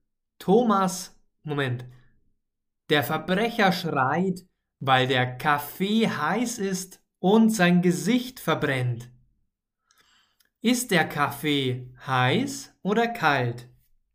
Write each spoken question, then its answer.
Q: Ist der Kaffee heiß oder kalt?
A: Heiß. Der Kaffee ist heiß.